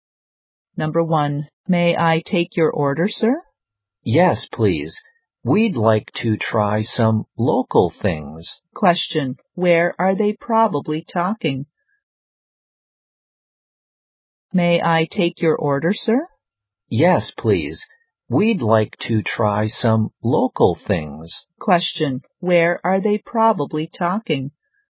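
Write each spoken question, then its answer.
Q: Question, where are they probably talking?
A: In a restaurant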